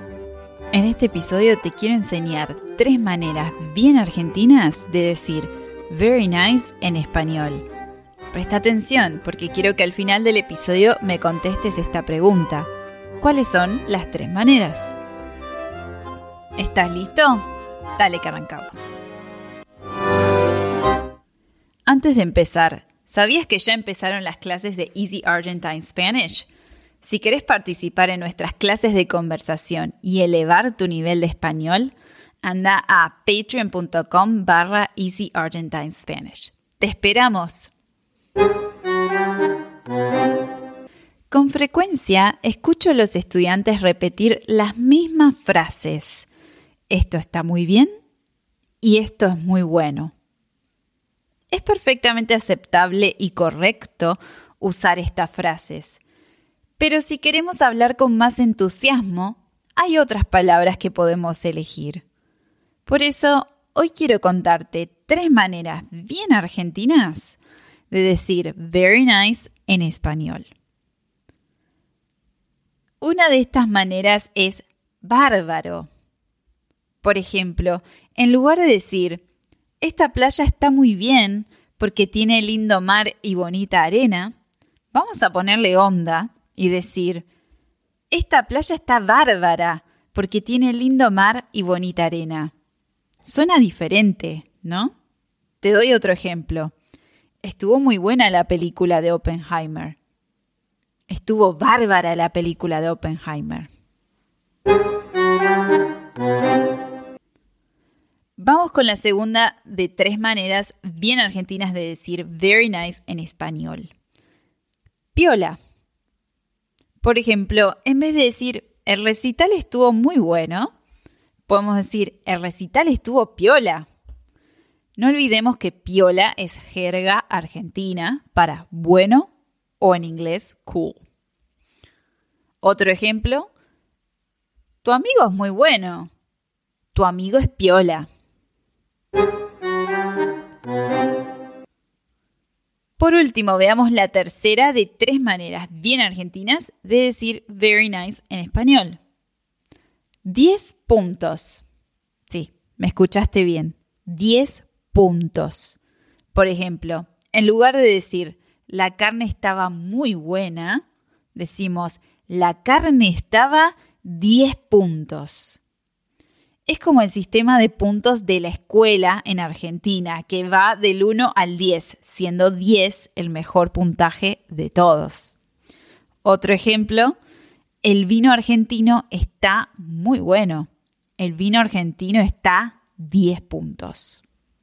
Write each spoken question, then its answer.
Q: ¿Cuáles son las tres maneras?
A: las tres maneras de decir very nice en español al estilo argentino son bárbaro, piola y 10 puntos